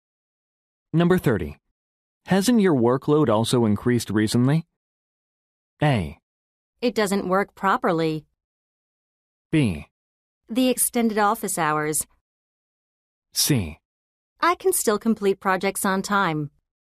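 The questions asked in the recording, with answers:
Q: Hasn't your workload also increased recently?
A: C: I can still complete projects on time.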